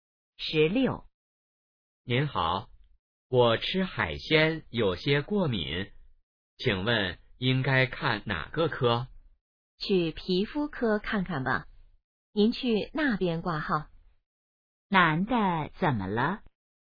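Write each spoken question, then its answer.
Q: 男的怎么了?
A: 吃海鲜过敏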